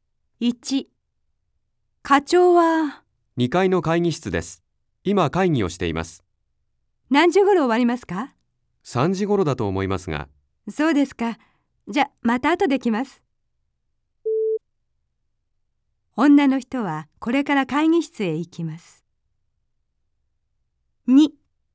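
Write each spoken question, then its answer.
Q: 女の人はこれから会議室へ行きます。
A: いいえ(×)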